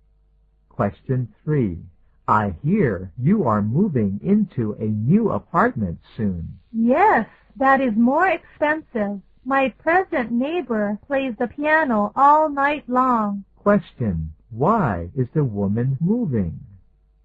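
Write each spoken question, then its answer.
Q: Why is the woman moving?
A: Her present neighbor plays the piano all night long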